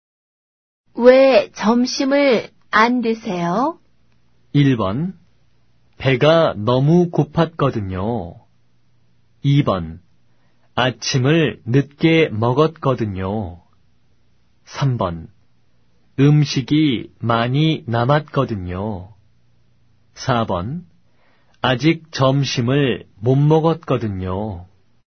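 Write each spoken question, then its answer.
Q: 왜 점심을 안 드세요?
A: 2: 아침을 늦게 먹었거든요.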